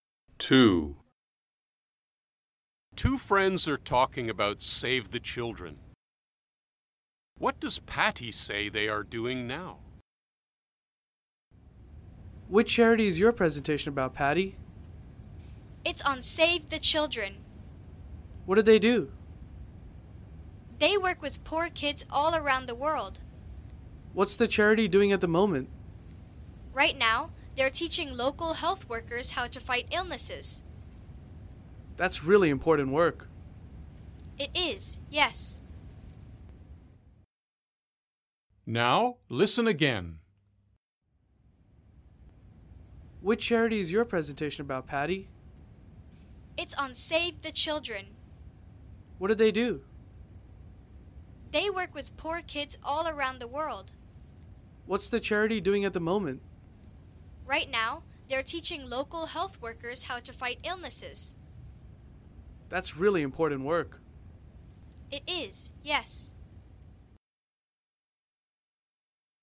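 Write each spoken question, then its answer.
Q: What does Patty say they are doing now?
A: Teaching local health workers how to fight illnesses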